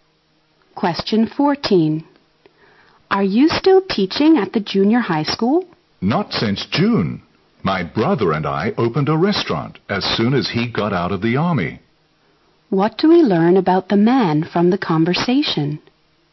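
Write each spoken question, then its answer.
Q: What do we learn about the man from the conversation?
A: He stopped teaching in June and now runs a restaurant with his brother.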